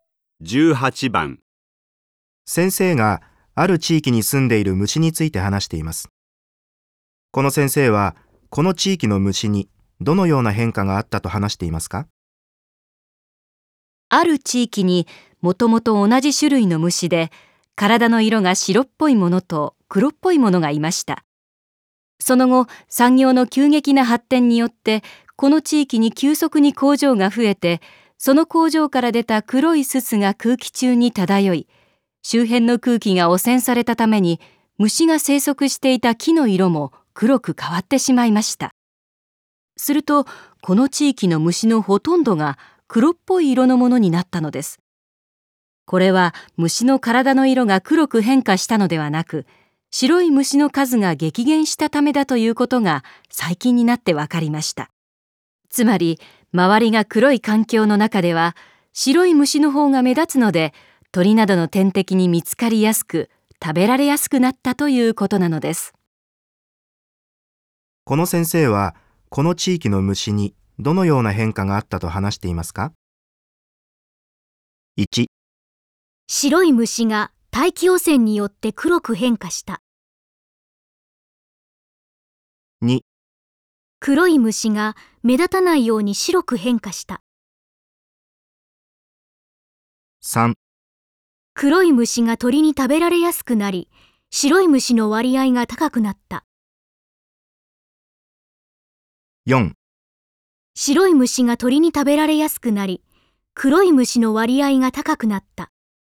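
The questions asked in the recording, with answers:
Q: この先生は、この地域の虫にどのような変化があったと話していますか?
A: 4: 白い虫が鳥に食べられやすくなり、黒い虫の割合が高くなった。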